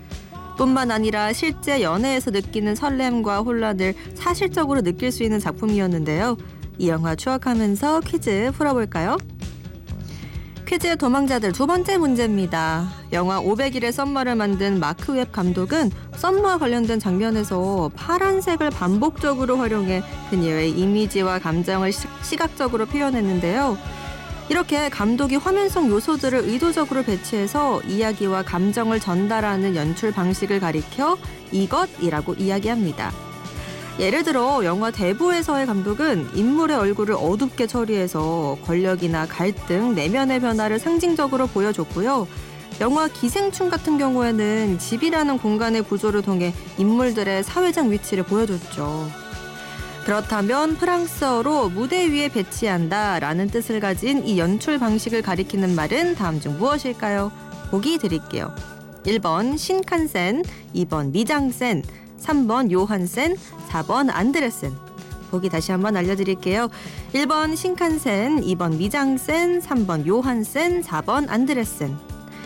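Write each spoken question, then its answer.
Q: 그렇다면 프랑스어로 무대 위에 배치한다라는 뜻을 가진 이 연출 방식을 가리키는 말은 다음 중 무엇일까요?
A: 2: 미장센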